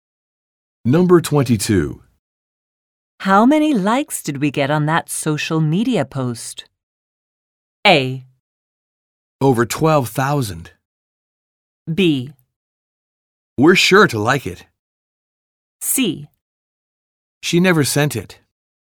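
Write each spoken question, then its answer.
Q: How many likes did we get on that social media post?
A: A: Over 12,000.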